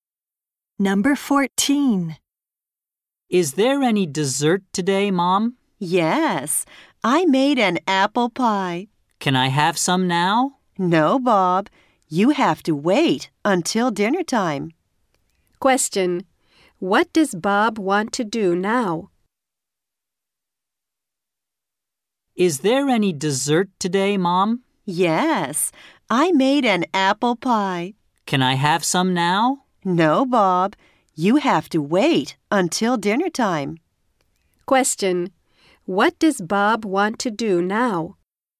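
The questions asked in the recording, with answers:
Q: What does Bob want to do now?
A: Eat some apple pie.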